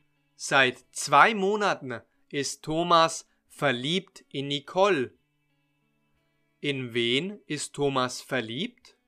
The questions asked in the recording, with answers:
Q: In wen ist Thomas verliebt?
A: in Nicole. Er ist in Nicole verliebt.